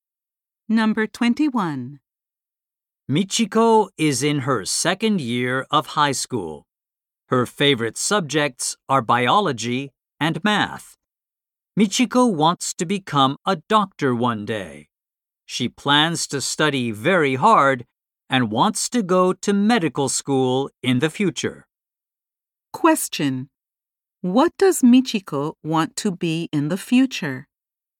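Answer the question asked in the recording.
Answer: A doctor.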